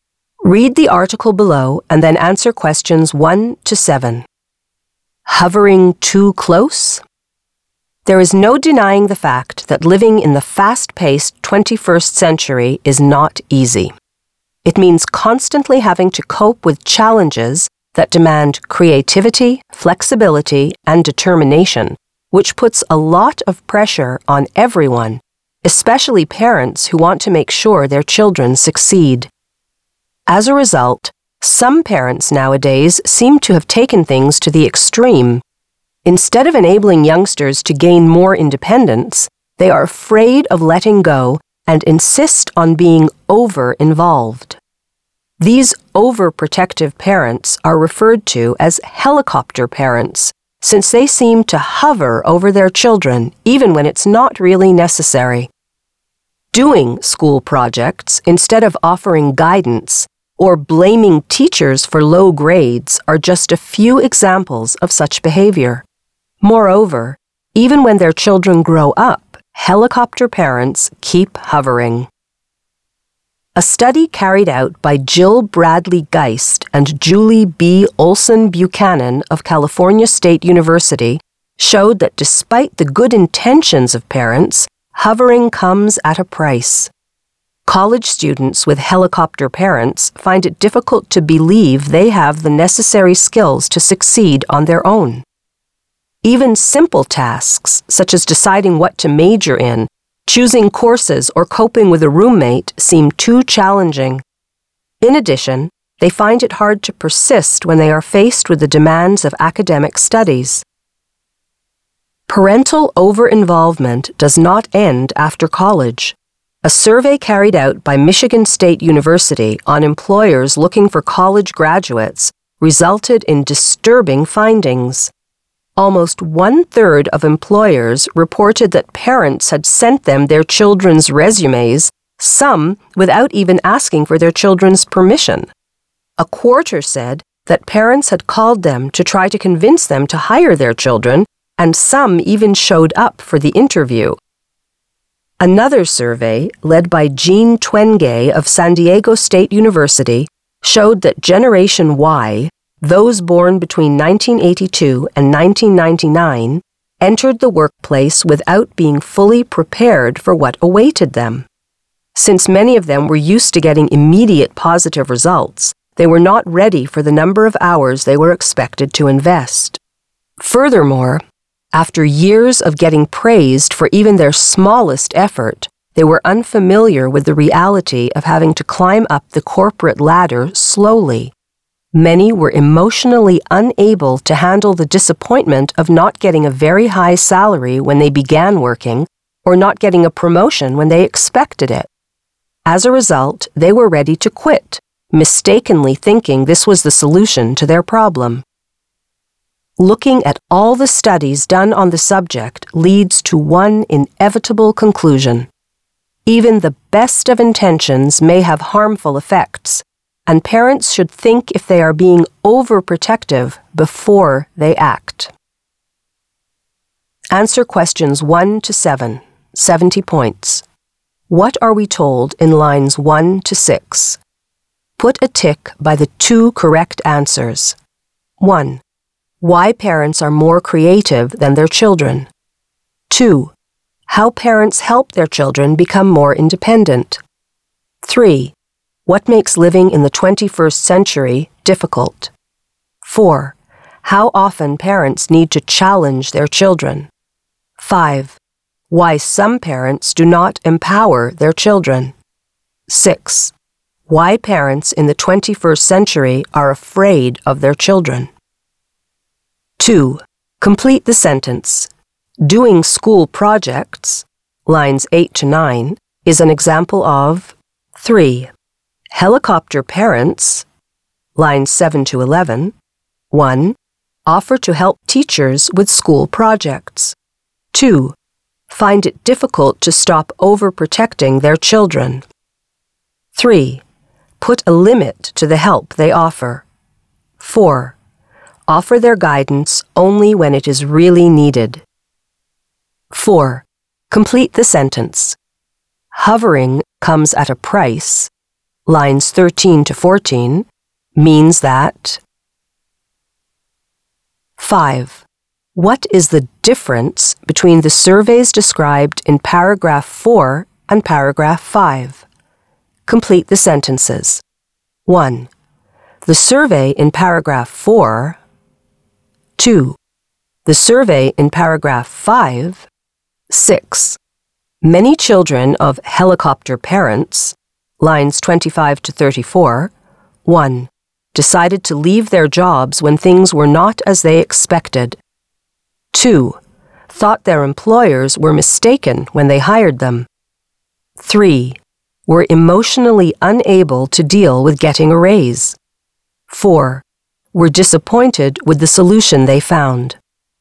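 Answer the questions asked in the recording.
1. 3: What makes living in the 21st century difficult; 5: Why some parents do not empower their children
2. parents' over-involvement (overprotective behavior)
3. 2: Find it difficult to stop overprotecting their children.
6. 1: Decided to leave their jobs when things were not as they expected.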